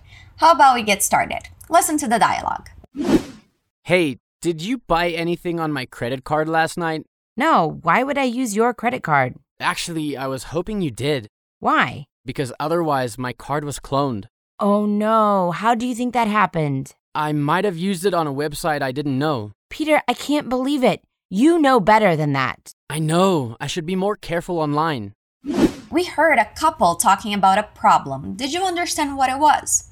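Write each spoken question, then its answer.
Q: Did you understand what it was?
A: His credit card may have been cloned (someone used it without his knowledge).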